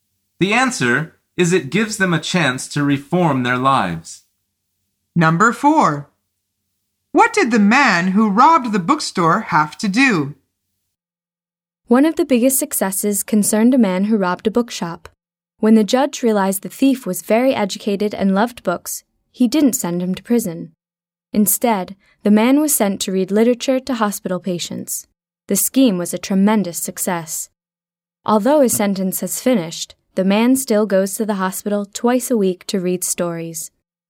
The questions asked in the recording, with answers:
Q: What did the man who robbed the bookstore have to do?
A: The answer is he had to read literature to hospital patients.